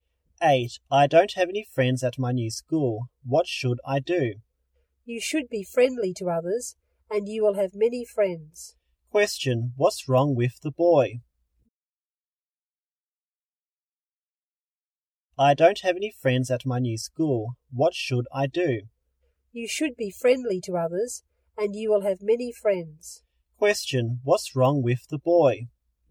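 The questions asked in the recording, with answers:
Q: Question, what's wrong with the boy?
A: He doesn't have any friends at his new school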